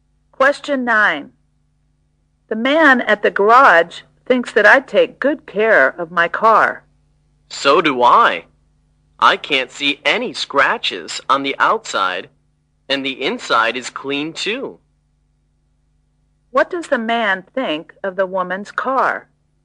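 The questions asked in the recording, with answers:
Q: What does the man think of the woman's car?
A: It is well cared for: clean and with no scratches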